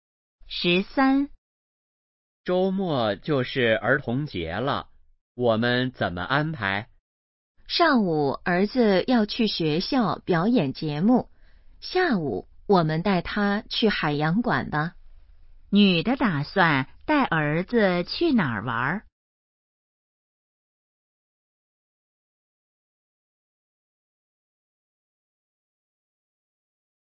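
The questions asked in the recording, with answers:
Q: 女的打算带儿子去哪儿玩?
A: 海洋馆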